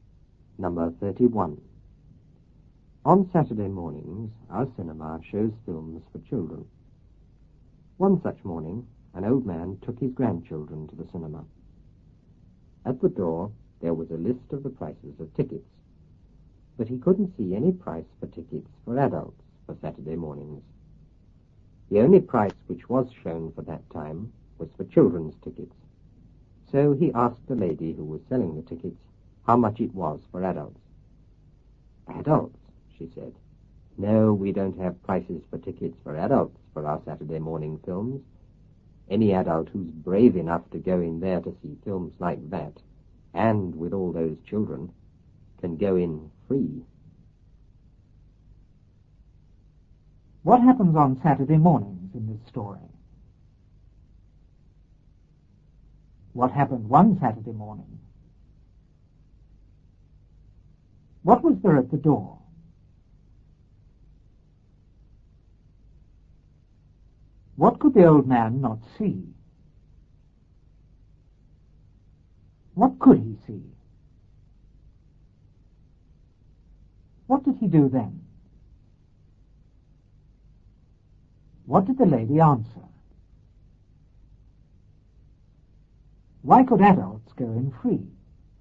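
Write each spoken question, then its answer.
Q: What happens on Saturday mornings in this story?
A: The cinema shows films for children.

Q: What happened one Saturday morning?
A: An old man took his grandchildren to the cinema.

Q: What was there at the door?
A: A list of the prices of tickets.

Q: What could the old man not see?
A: Any price for adult tickets for Saturday mornings.

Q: What could he see?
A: Only the price for children's tickets.

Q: What did he do then?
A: He asked the ticket lady how much it was for adults.

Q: What did the lady answer?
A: They had no adult prices; adults brave enough could go in free.

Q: Why could adults go in free?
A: Because any adult brave enough to watch those films with all those children deserved to go in free.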